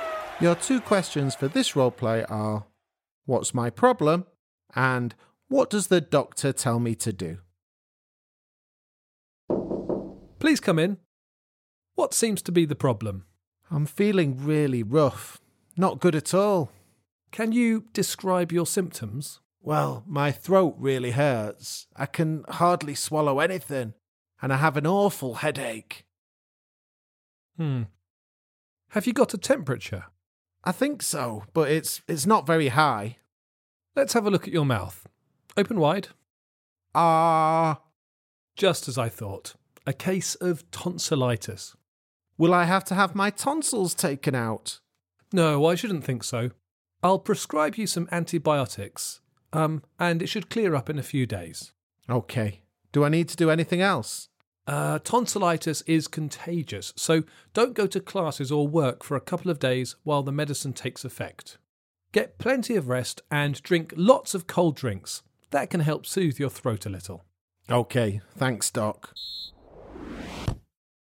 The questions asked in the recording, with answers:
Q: What's my problem?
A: And in roleplay three, I had tonsillitis